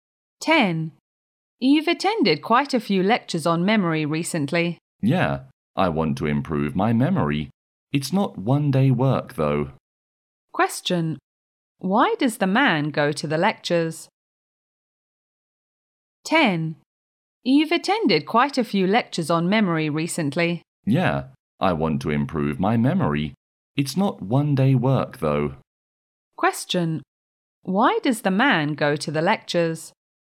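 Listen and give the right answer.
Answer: To improve his memory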